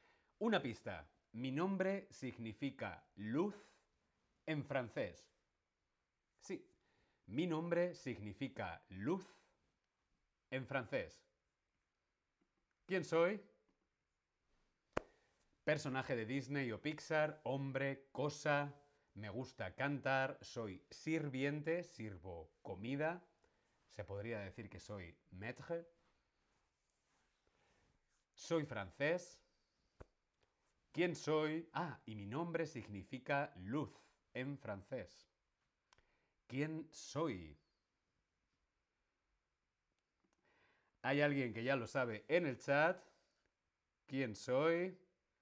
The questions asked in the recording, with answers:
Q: ¿Quién soy?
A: Lumière. Mais oui, je suis lumière de la bella y la bestia.